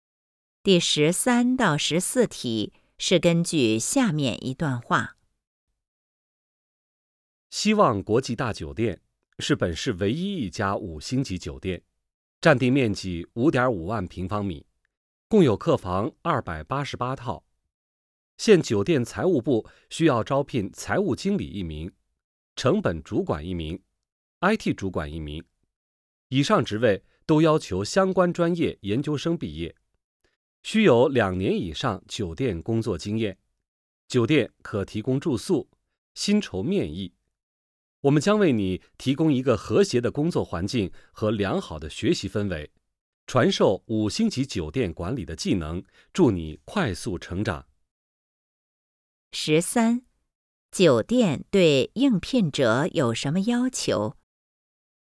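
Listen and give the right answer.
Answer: 相关专业研究生毕业,有两年以上酒店工作经验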